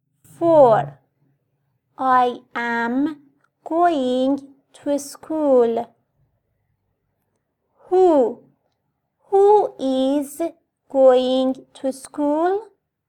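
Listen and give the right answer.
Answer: I am (the speaker)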